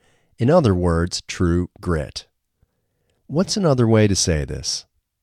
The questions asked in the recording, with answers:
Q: What's another way to say this?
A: Another way to say this is true grit.